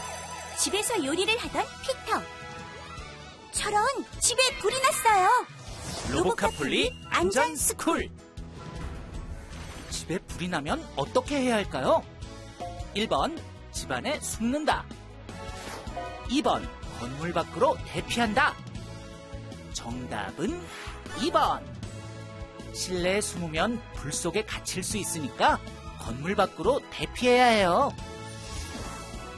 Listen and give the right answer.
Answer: 정답은 2번.